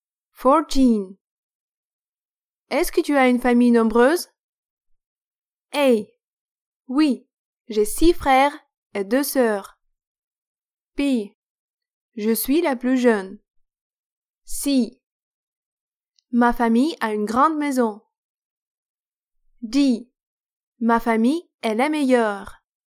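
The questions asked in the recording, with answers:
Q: Est-ce que tu as une famille nombreuse?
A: A: Oui, j'ai 6 frères et 2 sœurs.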